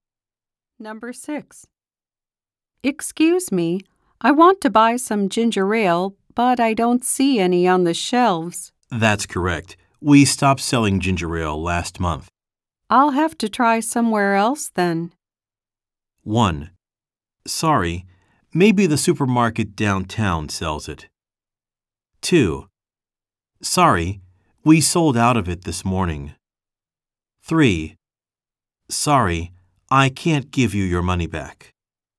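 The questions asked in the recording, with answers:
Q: I'll have to try somewhere else then.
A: 1: Sorry, maybe the supermarket downtown sells it.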